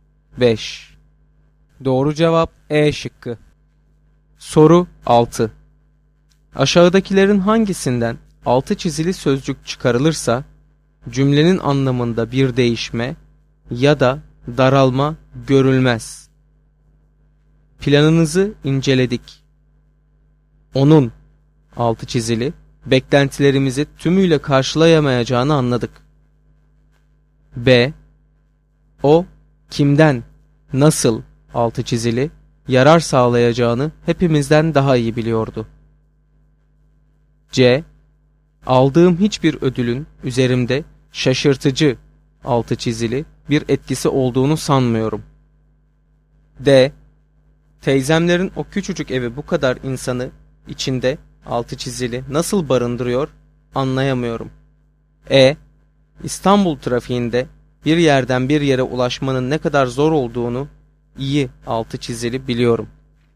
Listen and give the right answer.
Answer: Doğru cevap D şıkkı.